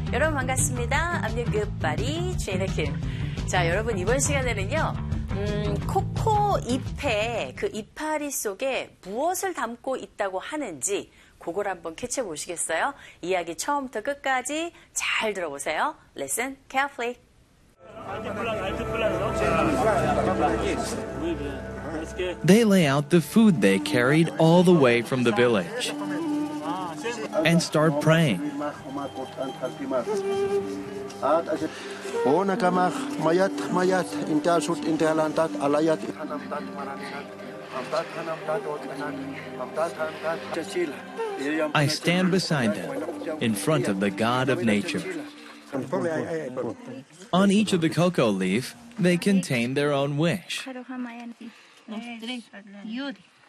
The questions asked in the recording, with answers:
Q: 코코 잎에 그 이파리 속에 무엇을 담고 있다고 하는지 그걸 한번 캐치해 보시겠어요?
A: 잎 하나하나에 사람들의 그 소망이 담겨있다